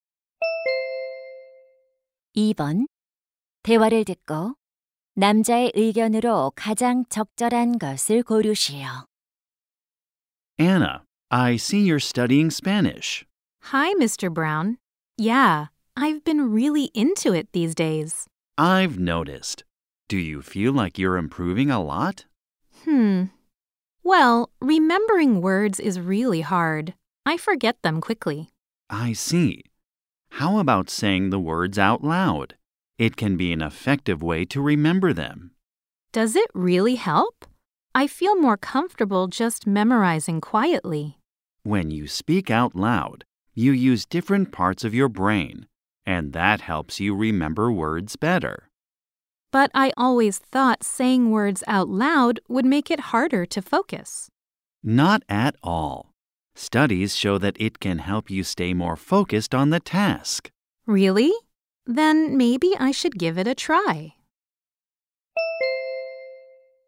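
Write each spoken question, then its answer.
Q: 대화를 듣고 남자의 의견으로 가장 적절한 것을 고르시오.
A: 단어를 소리 내어 말하면 암기에 도움이 된다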